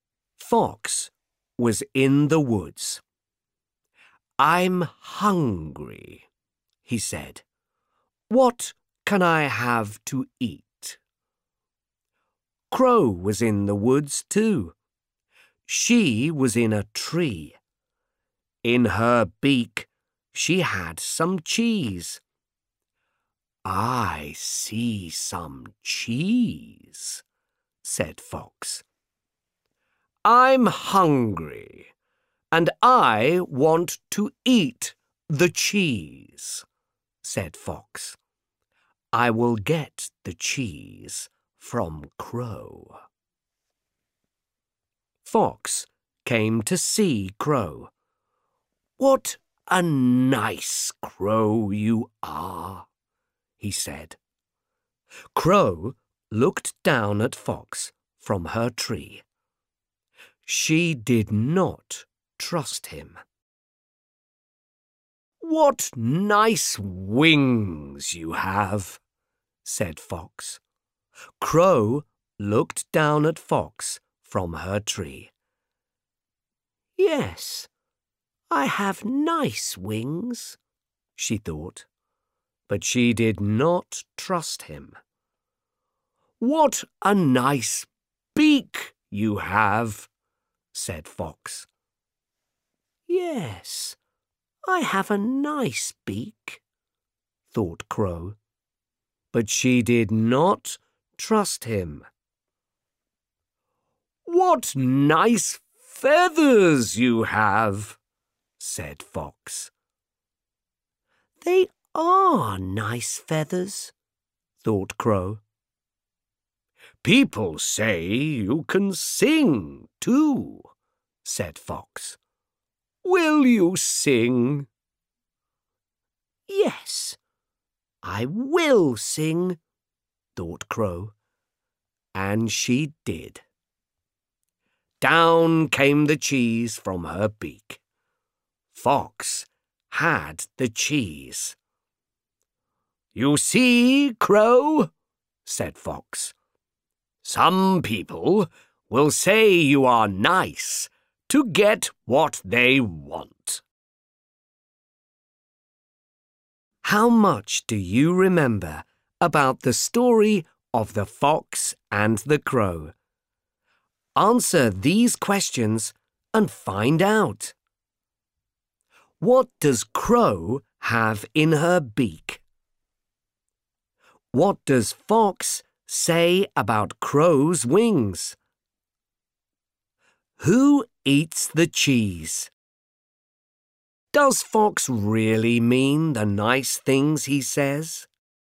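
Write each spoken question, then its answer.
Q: What does Crow have in her beak?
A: Some cheese

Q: What does Fox say about Crow's wings?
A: What nice wings you have

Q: Who eats the cheese?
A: Fox

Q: Does Fox really mean the nice things he says?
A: No, he says them to get the cheese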